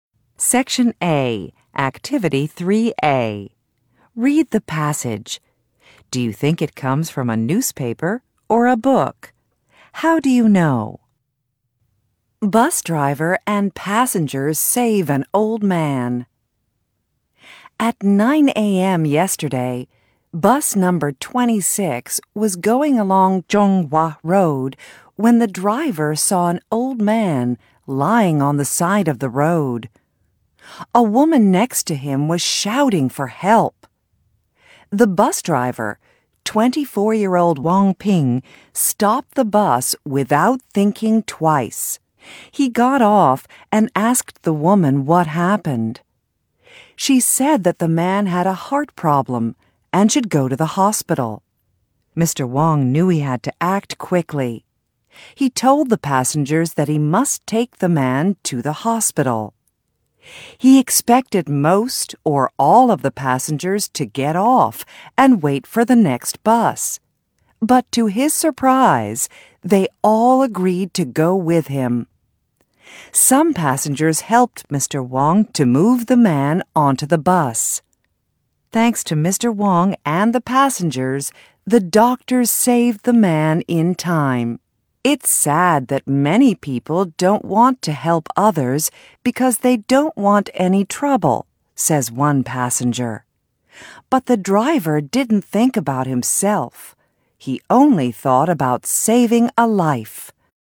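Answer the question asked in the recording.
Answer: A newspaper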